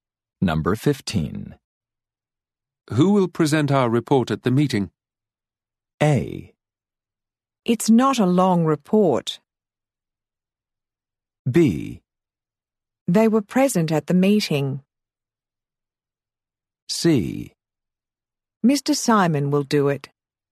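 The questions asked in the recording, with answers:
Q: Who will present our report at the meeting?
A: C: Mr. Simon will do it.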